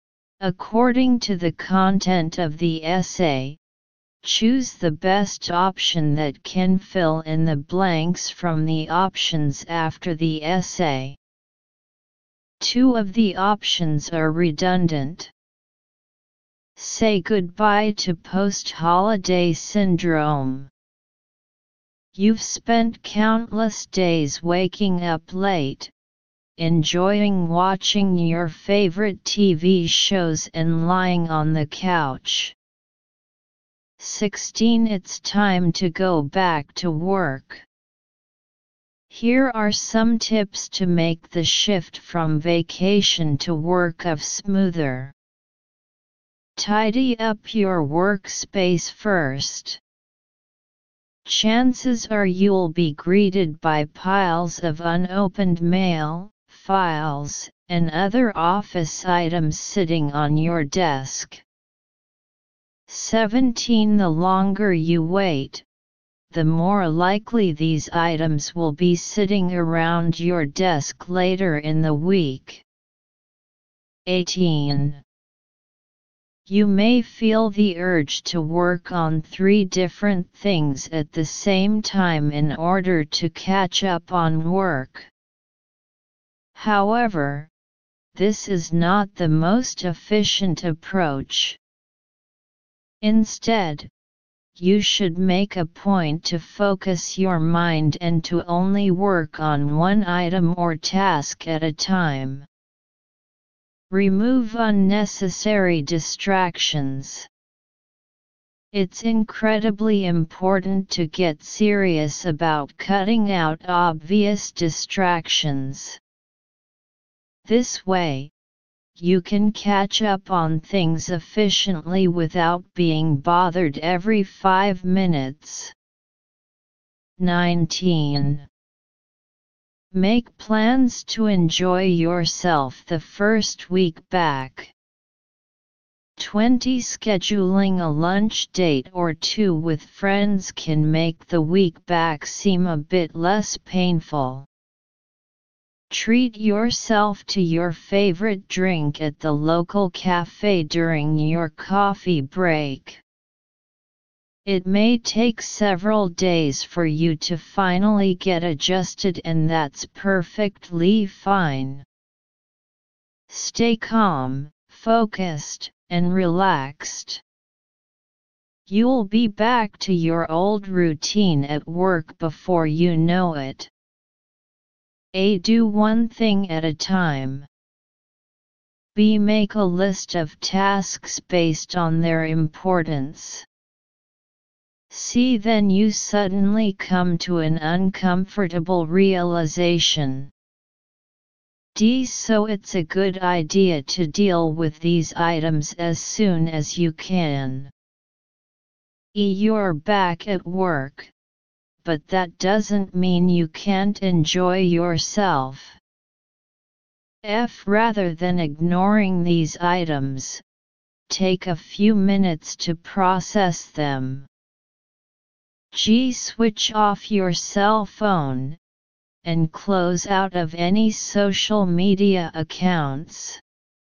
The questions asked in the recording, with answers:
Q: 16 It's time to go back to work.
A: 16. C.

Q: 17 The longer you wait, the more likely these items will be sitting around your desk later in the week.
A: 17. F.

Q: 18 you may feel the urge to work on three different things at the same time in order to catch up on work.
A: 18. A.

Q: 19. Make plans to enjoy yourself the first week back.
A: 19. G.

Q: 20. Scheduling a lunch date or two with friends can make the week back seem a bit less painful.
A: 20. E.